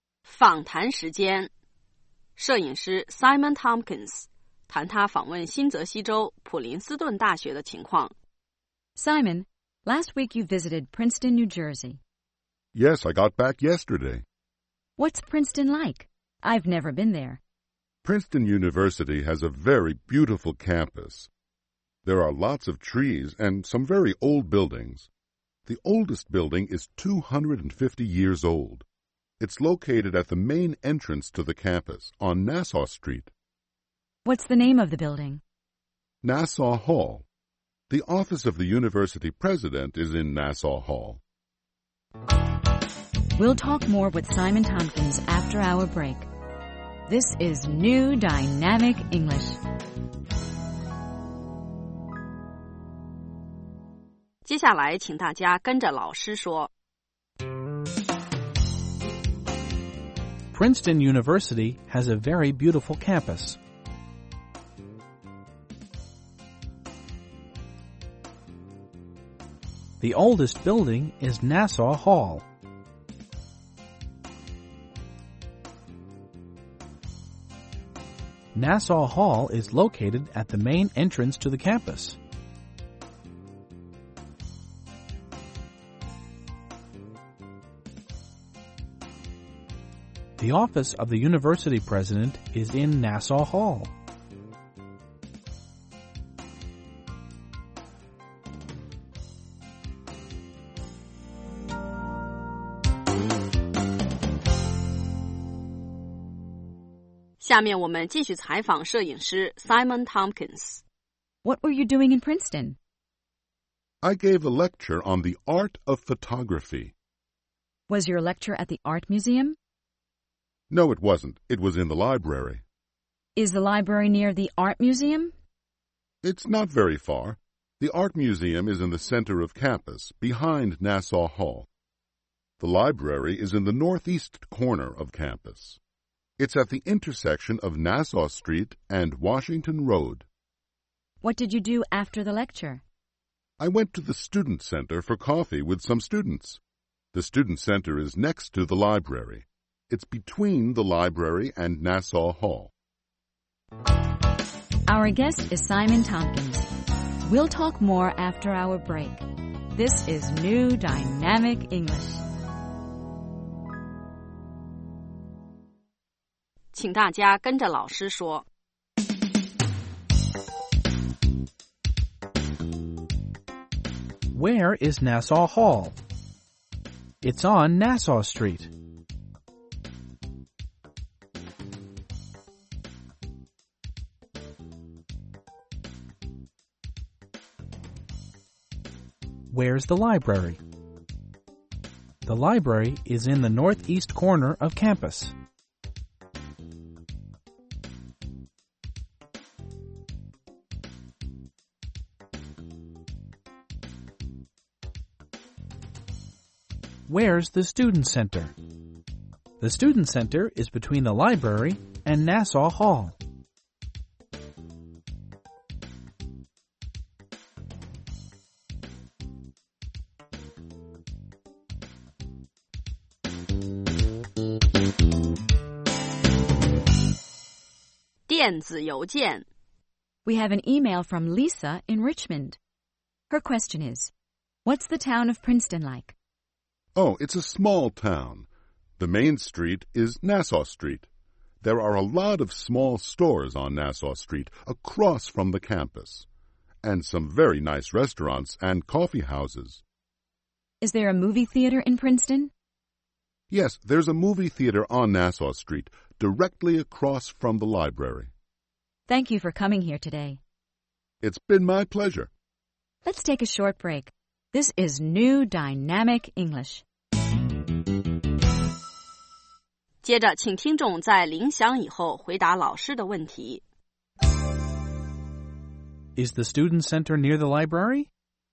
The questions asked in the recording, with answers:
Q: Is the student center near the library?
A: Yes, it is. It's next to the library.